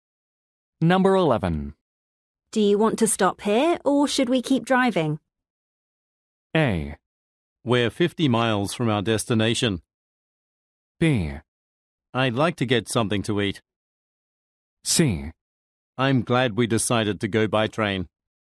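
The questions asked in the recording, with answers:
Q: Do you want to stop here or should we keep driving?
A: B: I'd like to get something to eat.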